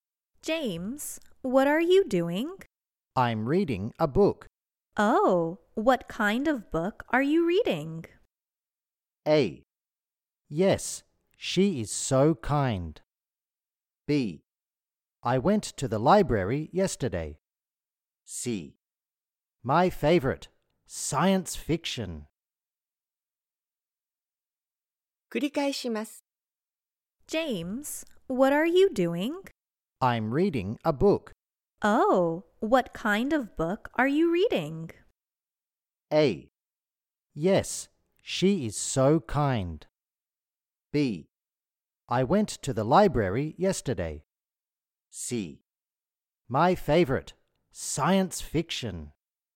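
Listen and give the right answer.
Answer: C: My favorite, science fiction.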